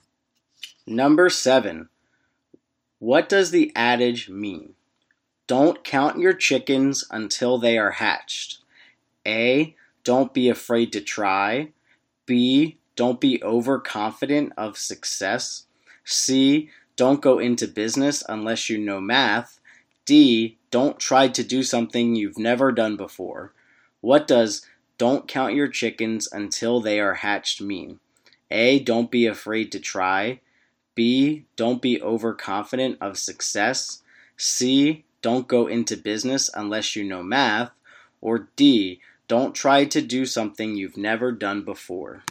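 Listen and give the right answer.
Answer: B: Don't be overconfident of success.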